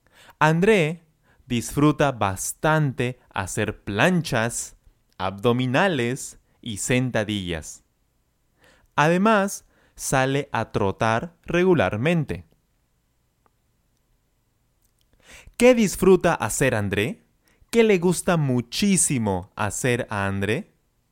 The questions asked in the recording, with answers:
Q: ¿Qué disfruta hacer André?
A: Muy fácil. Él disfruta bastante hacer planchas, abdominales y sentadillas.